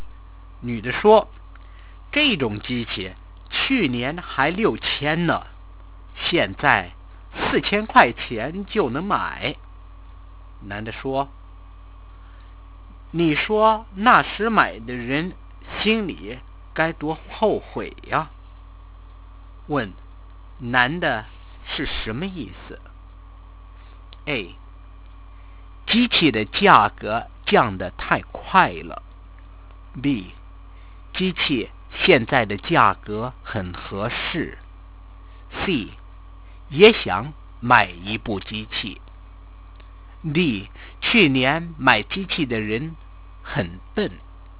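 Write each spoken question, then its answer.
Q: 问,男的是什么意思?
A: A: 机器的价格降得太快了。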